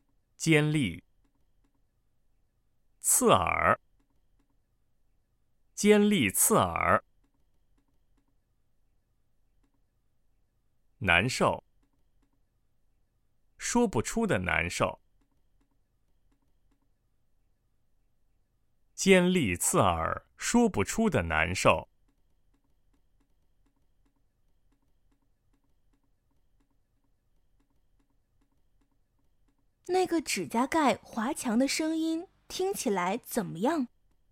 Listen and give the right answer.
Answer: 尖利刺耳,说不出的难受。